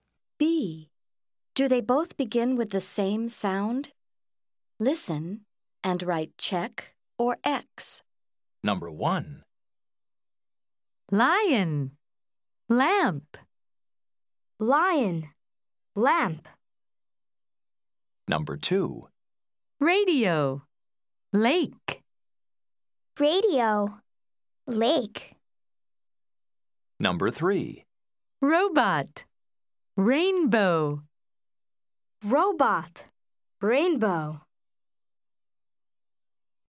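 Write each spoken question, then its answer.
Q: Do they both begin with the same sound?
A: Yes (lion, lamp)

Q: Do they both begin with the same sound?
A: No (radio, lake)

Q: Do they both begin with the same sound?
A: Yes (robot, rainbow)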